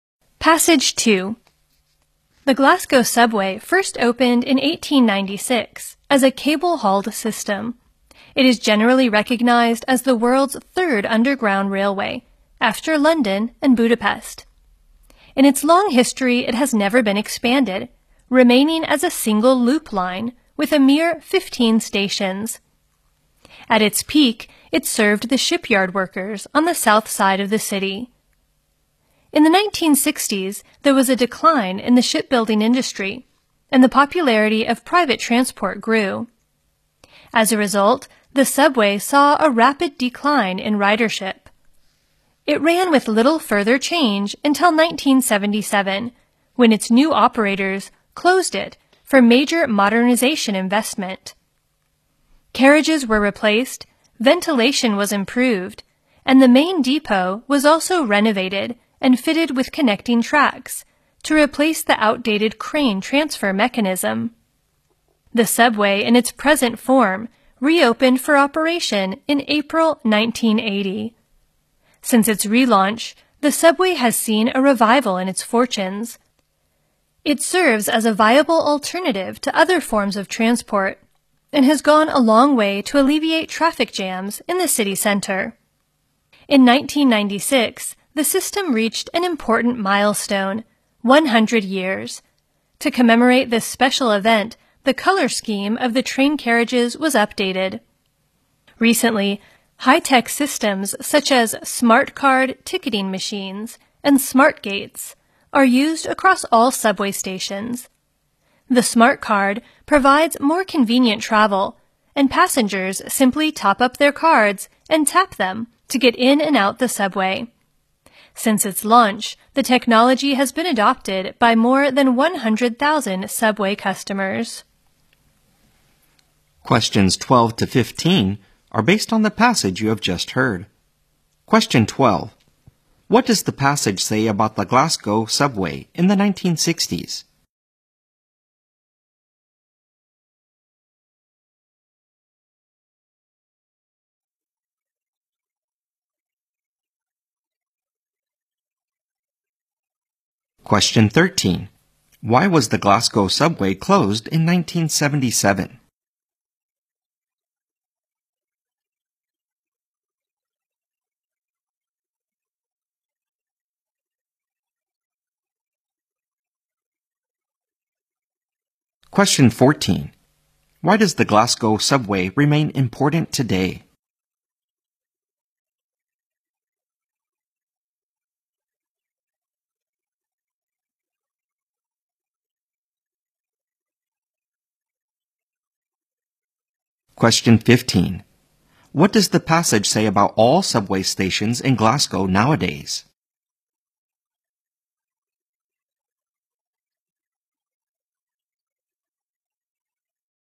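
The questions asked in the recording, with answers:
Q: What does the passage say about the Glasgow subway in the 1960s?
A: It saw a rapid decline in ridership

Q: Why was the Glasgow subway closed in 1977?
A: For major modernization

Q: Why does the Glasgow subway remain important today?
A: It is a viable alternative to other transport and helps ease traffic jams in the city center

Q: What does the passage say about all subway stations in Glasgow nowadays?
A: They use high-tech systems such as smart card ticket machines and smart gates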